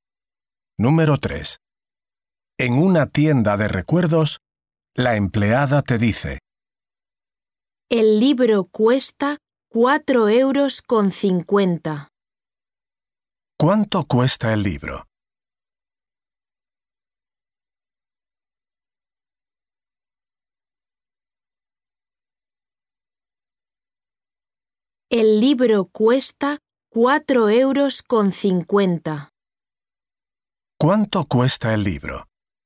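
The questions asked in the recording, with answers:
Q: ¿Cuánto cuesta el libro?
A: 4,50 €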